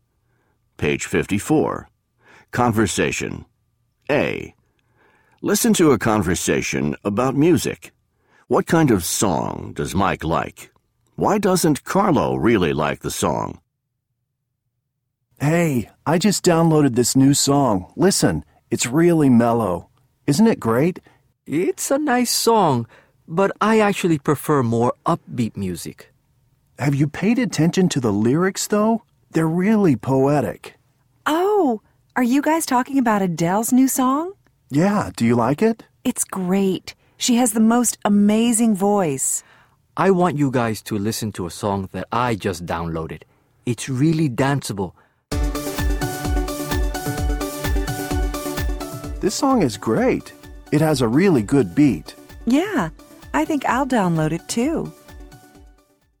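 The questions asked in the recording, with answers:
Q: Why doesn't Carlo really like the song?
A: He prefers more upbeat music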